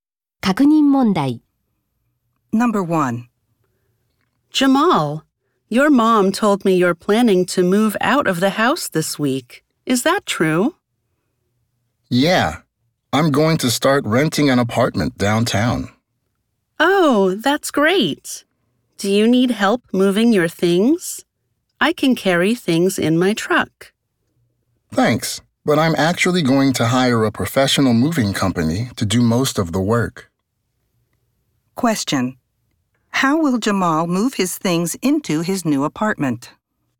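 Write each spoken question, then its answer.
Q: How will Jamal move his things into his new apartment?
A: He will hire a professional moving company.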